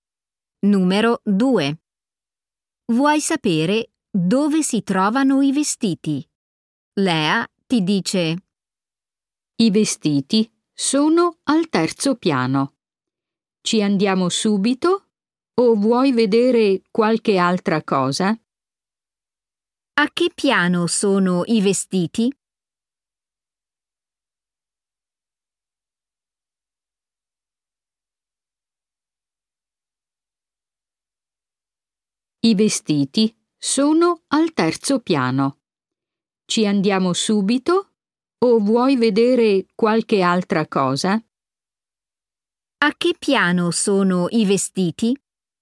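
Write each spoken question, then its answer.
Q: A che piano sono i vestiti?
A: al terzo piano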